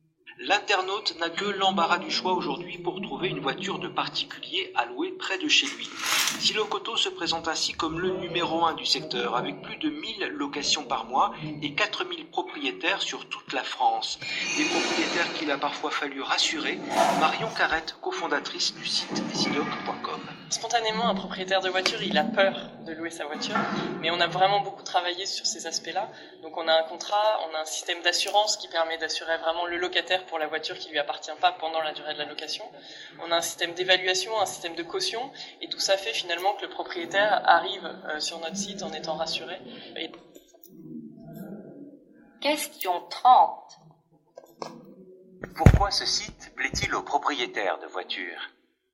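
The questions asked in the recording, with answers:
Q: Pourquoi ce site plaît-il aux propriétaires de voitures?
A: Il les rassure (contrat, assurance, évaluation, caution)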